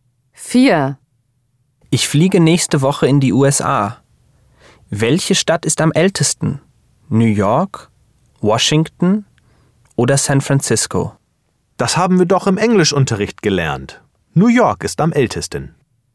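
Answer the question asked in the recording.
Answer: New York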